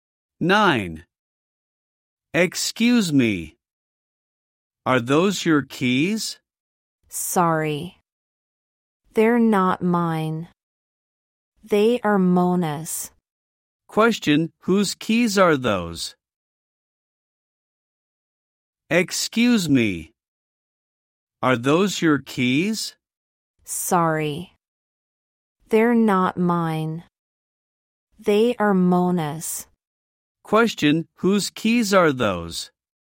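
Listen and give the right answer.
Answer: Mona's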